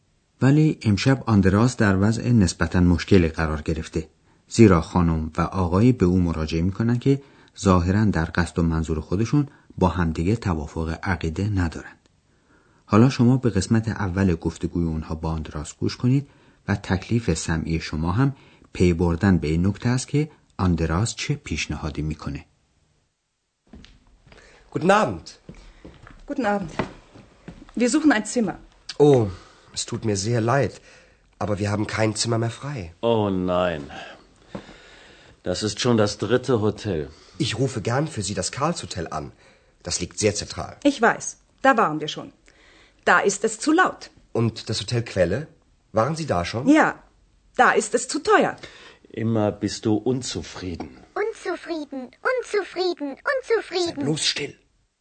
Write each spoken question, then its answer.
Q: تکلیف سمعی شما هم پی بردن به این نکته است که آندراس چه پیشنهادی می‌کنه.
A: آندراس پیشنهاد میکنه که به یک هتل دیگه تلفن بزنه.